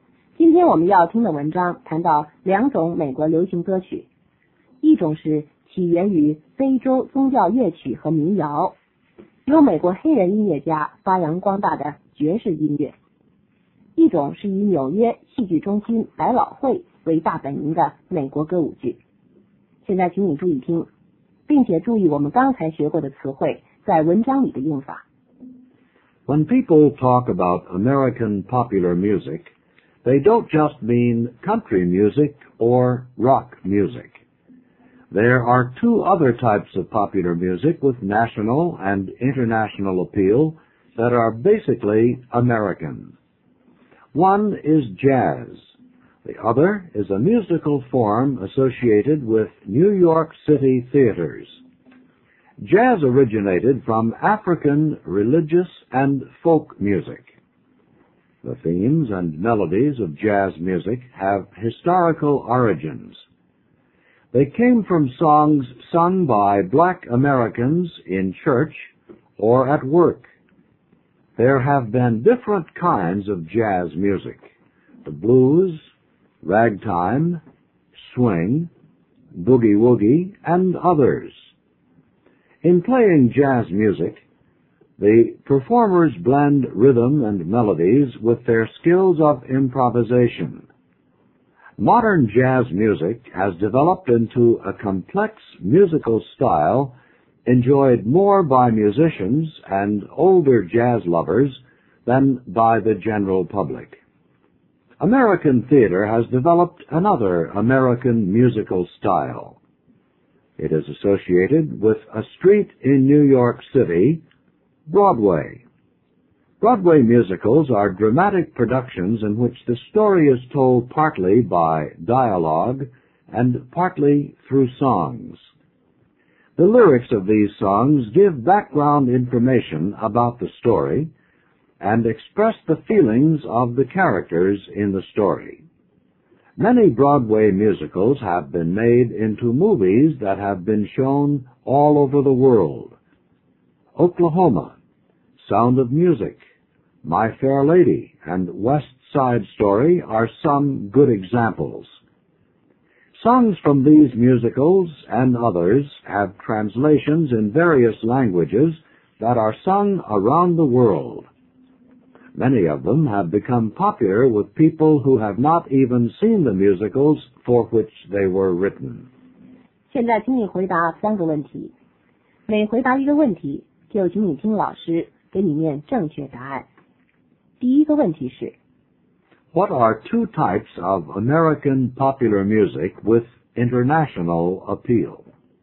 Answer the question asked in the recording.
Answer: They are jazz and Broadway musicals.